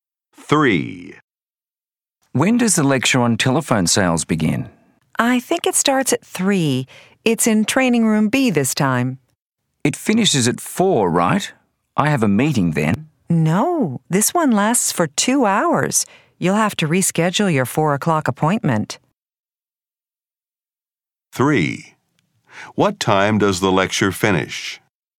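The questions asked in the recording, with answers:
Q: What time does the lecture finish?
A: At 5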